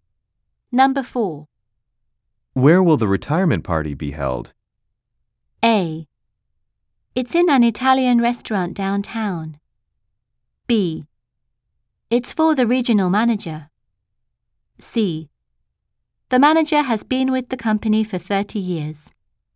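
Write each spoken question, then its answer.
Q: Where will the retirement party be held?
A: A: It's in an Italian restaurant downtown.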